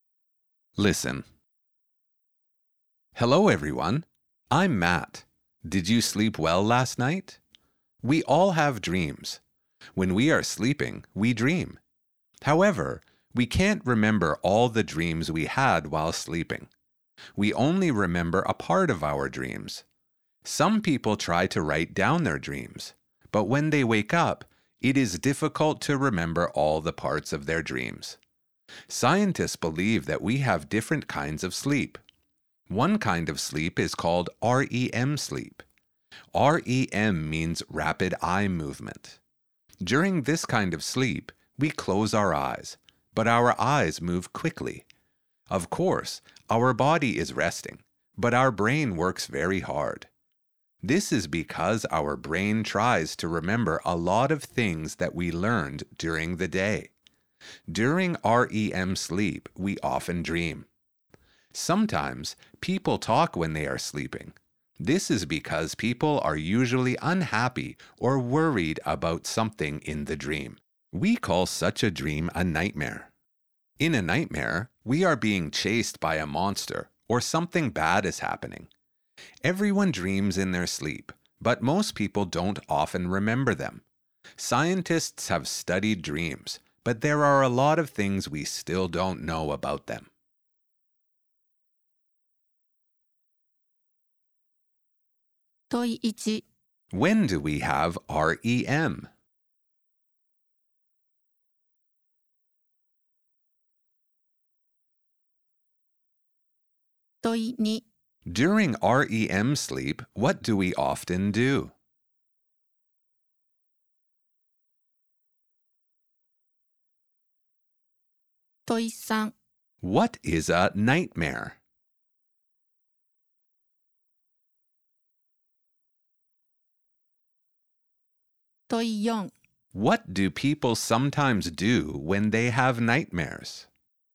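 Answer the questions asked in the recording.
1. during one kind of sleep, while we are sleeping
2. we dream
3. a bad dream in which we are unhappy or worried, such as being chased by a monster
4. they talk in their sleep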